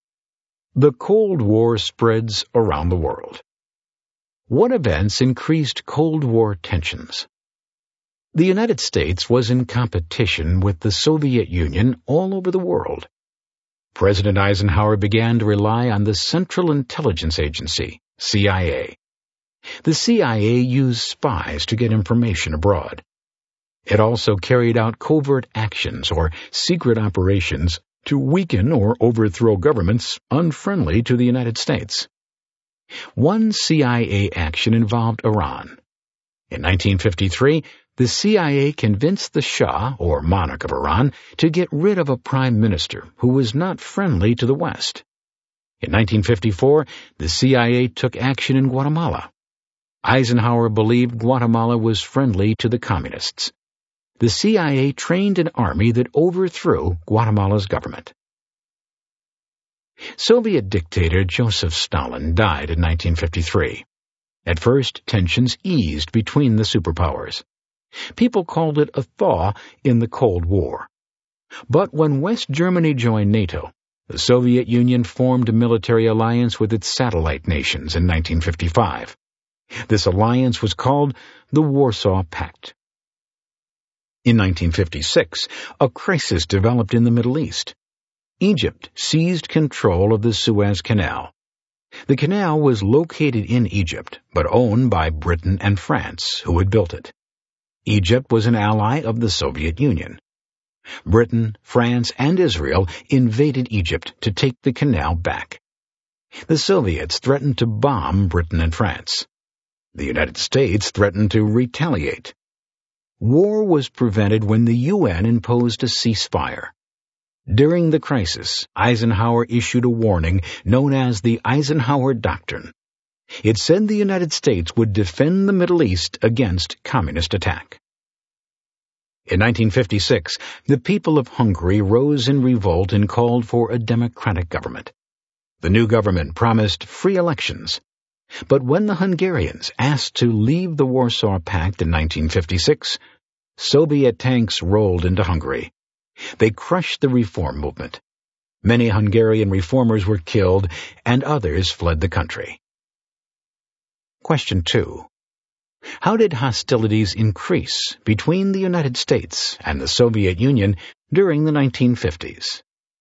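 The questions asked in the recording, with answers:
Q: How did hostilities increase between the United States and the Soviet Union during the 1950s?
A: CIA covert actions in Iran and Guatemala, the Warsaw Pact, the Suez crisis, and the Soviet crushing of Hungary's revolt.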